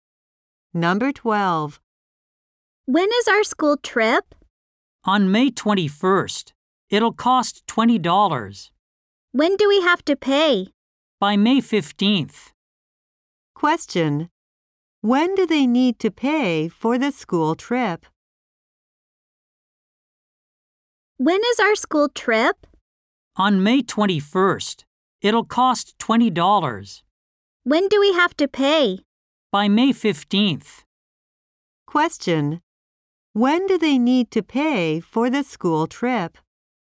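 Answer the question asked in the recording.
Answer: By May 15th.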